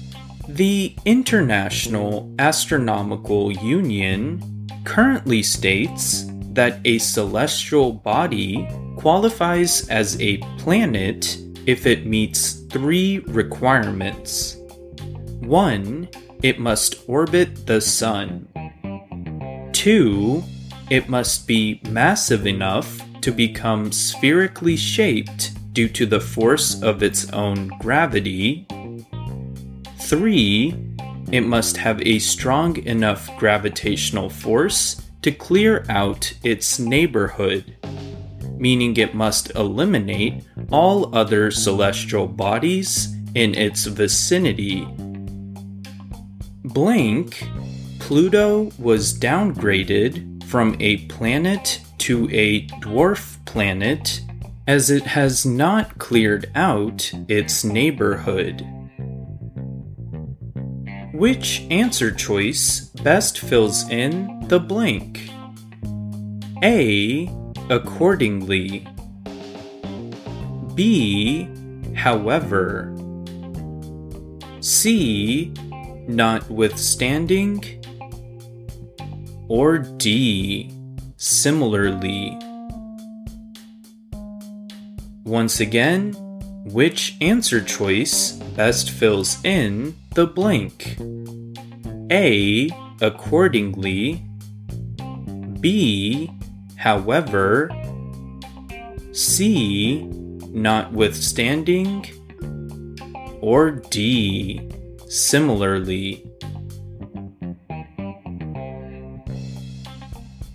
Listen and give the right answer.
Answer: The correct answer is A accordingly